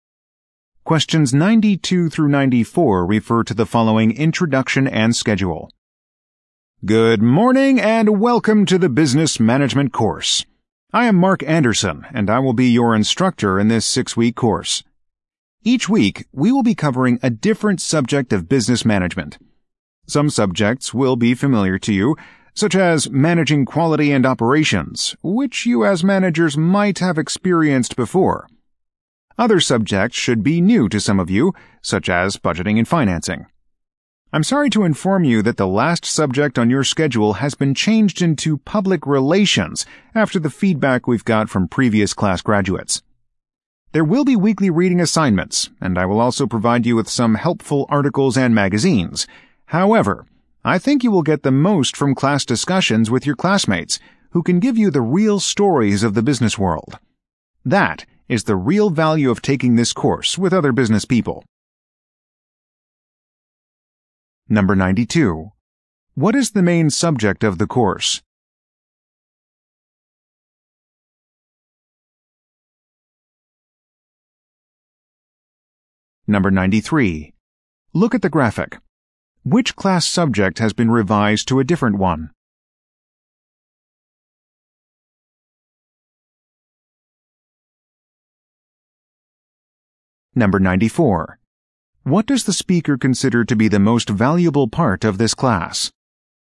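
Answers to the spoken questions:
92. Business management
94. Class discussions with other business people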